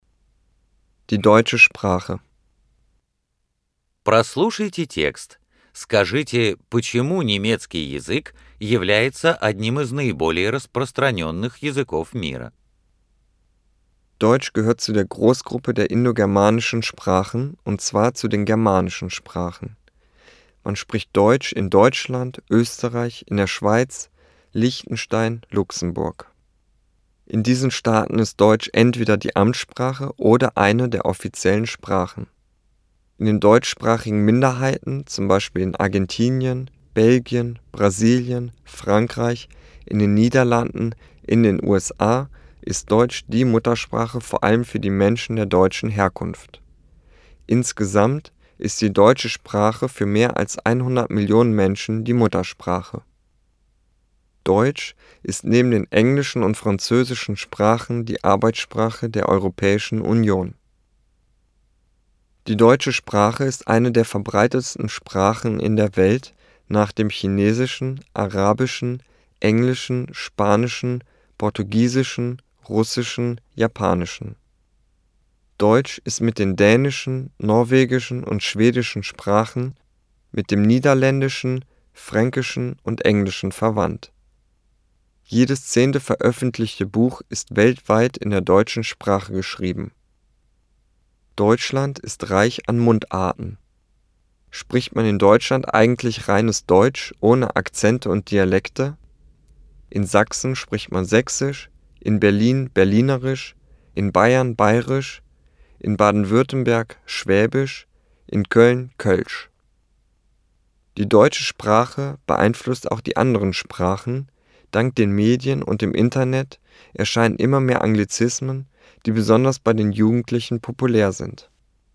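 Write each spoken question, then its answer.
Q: Скажите, почему немецкий язык является одним из наиболее распространенных языков мира?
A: На нём говорят в Германии, Австрии, Швейцарии, Лихтенштейне, Люксембурге и в немецкоязычных меньшинствах многих стран; для более чем 100 млн человек он родной, это рабочий язык ЕС, и каждая 10-я книга в мире издаётся на немецком.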